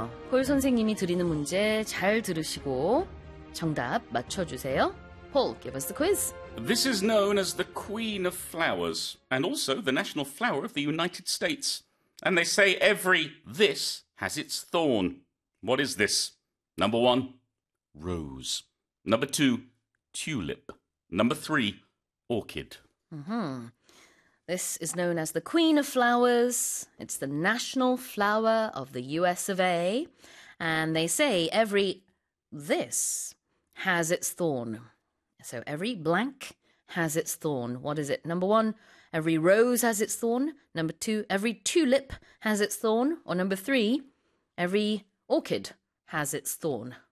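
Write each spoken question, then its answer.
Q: What is this? Number one, rose.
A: 1: rose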